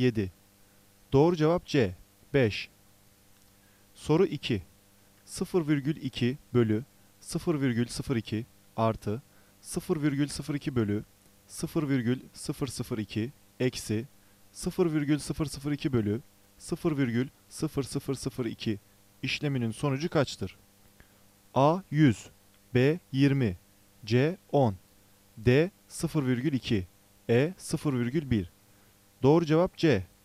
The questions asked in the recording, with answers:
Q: 0,2 bölü 0,02 artı 0,02 bölü 0,002 eksi 0,002 bölü 0,0002 işleminin sonucu kaçtır?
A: Doğru cevap C. 10.